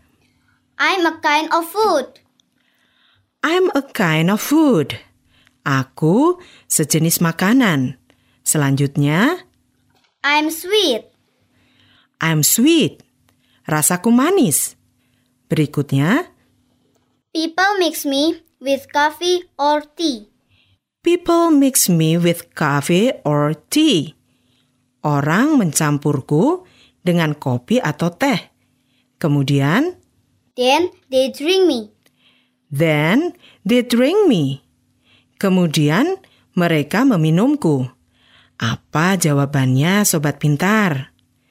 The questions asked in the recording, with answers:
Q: Apa jawabannya, sobat pintar?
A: Benar sekali. Jawabannya adalah gula atau sugar.